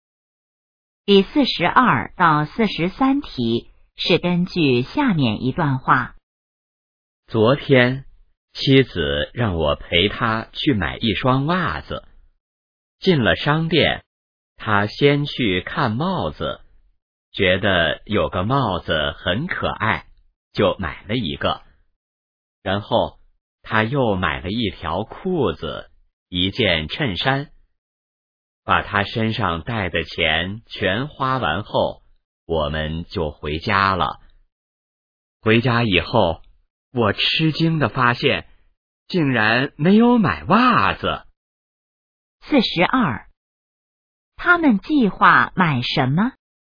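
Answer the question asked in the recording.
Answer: 一双袜子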